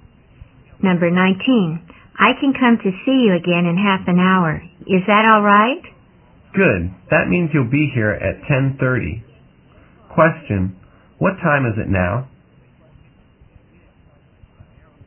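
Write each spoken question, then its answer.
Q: Question, what time is it now?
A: 10:00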